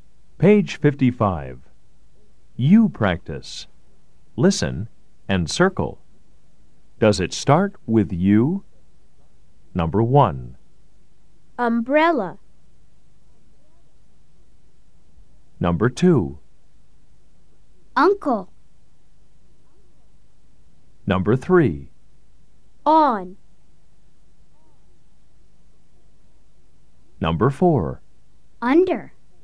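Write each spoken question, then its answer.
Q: Does it start with you? Number 1.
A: yes

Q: Number 2.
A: yes

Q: Number 3.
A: no

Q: Number 4.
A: yes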